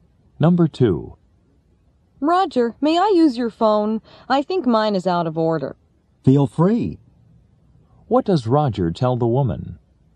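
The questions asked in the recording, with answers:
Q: What does Roger tell the woman?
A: She may use his phone.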